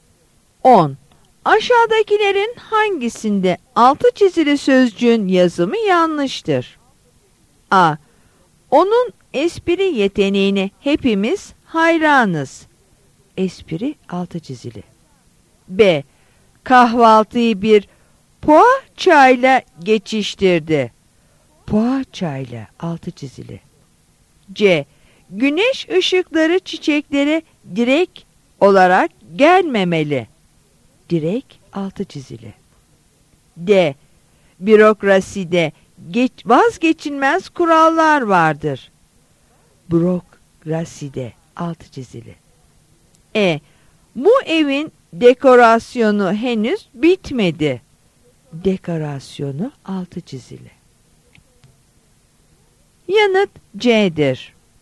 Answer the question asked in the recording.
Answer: Yanıt C'dir.